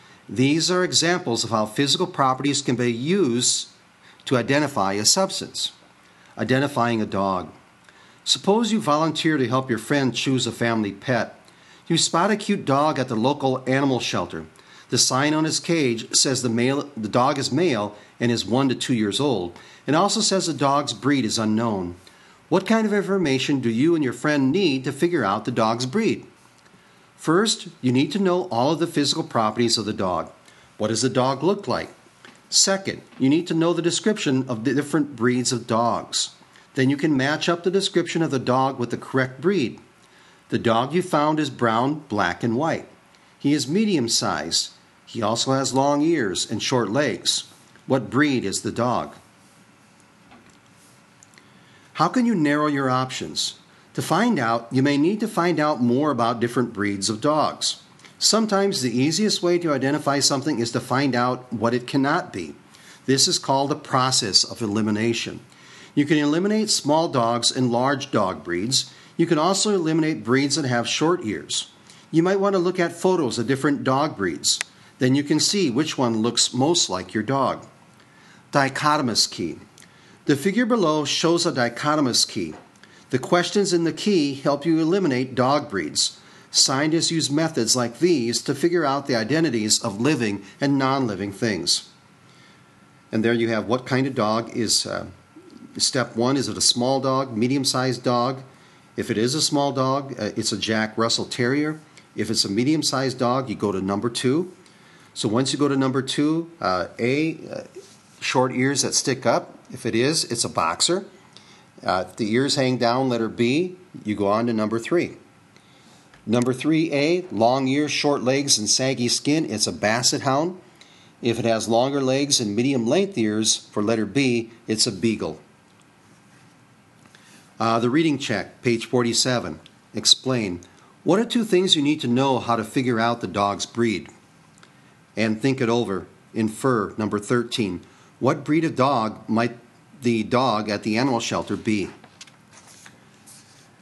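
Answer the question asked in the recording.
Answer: basset hound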